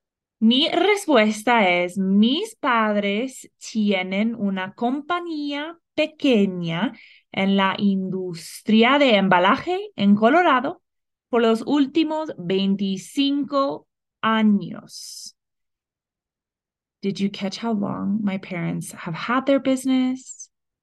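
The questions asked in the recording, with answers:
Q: Did you catch how long my parents have had their business?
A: 25 years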